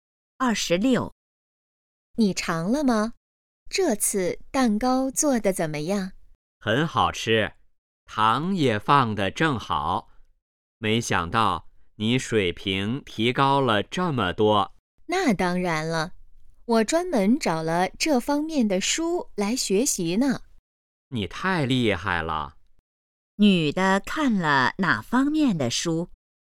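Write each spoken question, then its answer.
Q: 女的看了哪方面的书?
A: 做蛋糕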